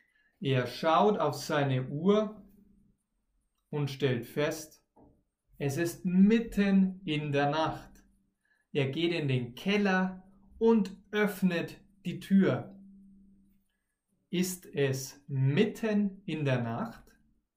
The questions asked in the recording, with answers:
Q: Ist es mitten in der Nacht?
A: Ja, es ist mitten in der Nacht.